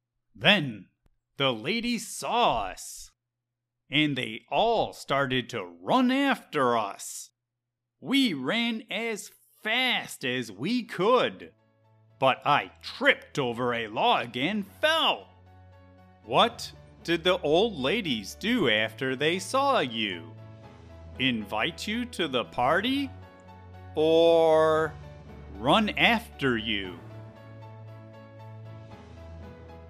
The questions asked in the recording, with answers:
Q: What did the old ladies do after they saw you? Invite you to the party? Or run after you?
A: After the old ladies saw us, they ran after us.